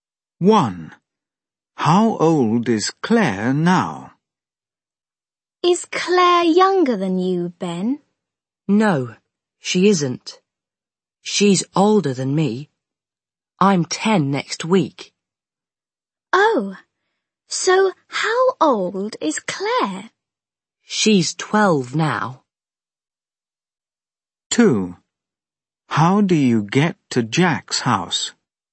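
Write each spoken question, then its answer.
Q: How old is Claire now?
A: 12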